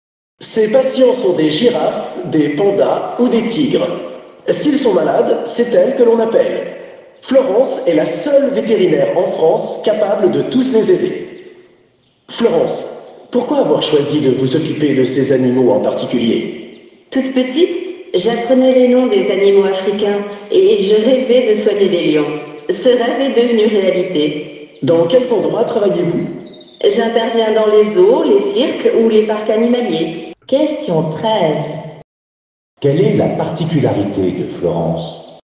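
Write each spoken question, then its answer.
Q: Quelle est la particularité de Florence ?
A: Elle est la seule vétérinaire en France capable de soigner tous ces animaux sauvages (girafes, pandas, tigres).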